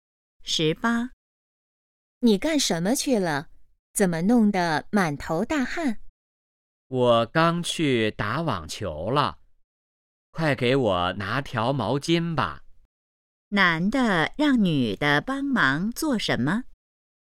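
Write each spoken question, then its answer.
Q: 男的让女的帮忙做什么?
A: 拿毛巾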